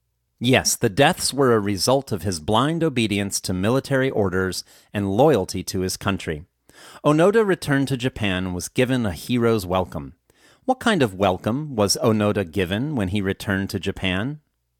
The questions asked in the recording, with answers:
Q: What kind of welcome was Onoda given when he returned to Japan?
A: Onoda was given a hero's welcome when he returned to Japan.